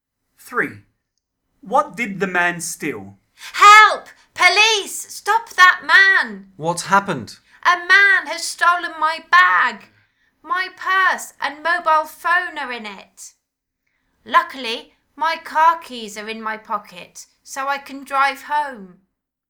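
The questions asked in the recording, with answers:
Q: What did the man steal?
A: a bag (with purse and mobile phone)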